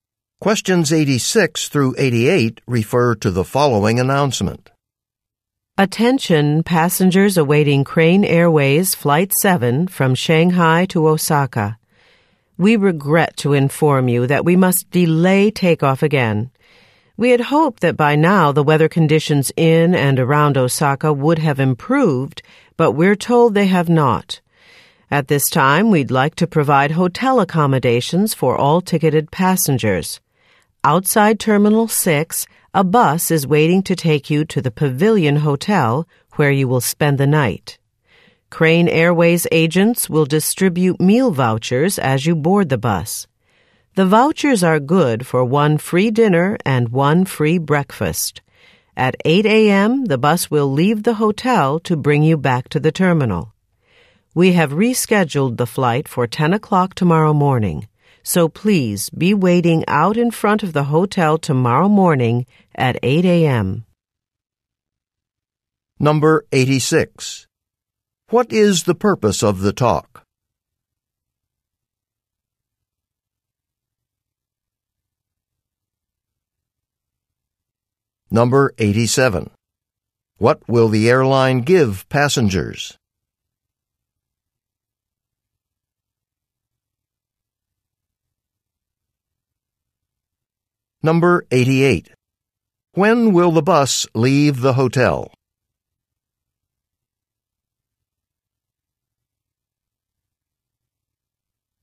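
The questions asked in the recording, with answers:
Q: What is the purpose of the talk?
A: To announce a flight delay

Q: What will the airline give passengers?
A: Meal vouchers and hotel rooms

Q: When will the bus leave the hotel?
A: At 8 a.m.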